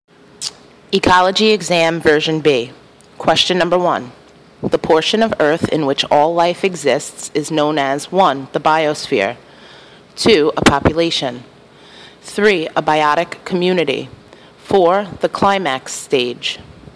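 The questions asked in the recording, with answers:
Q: The portion of Earth in which all life exists is known as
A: 1: The biosphere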